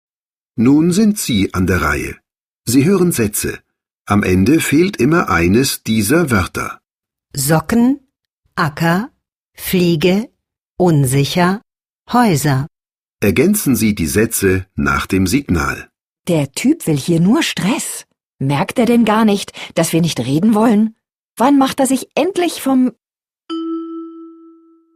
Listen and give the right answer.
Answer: Acker?